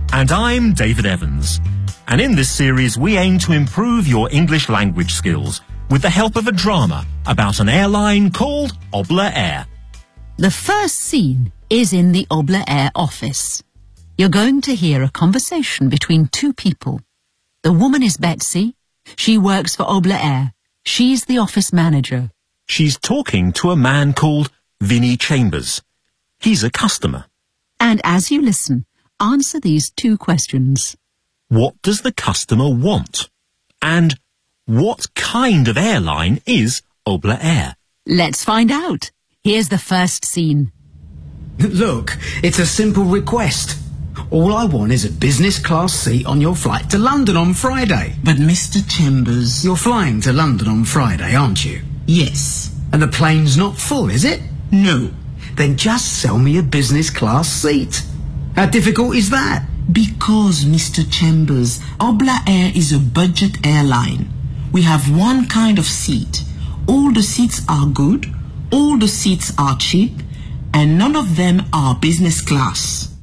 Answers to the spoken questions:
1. He wants a business class seat on the flight to London on Friday.
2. It's a budget airline.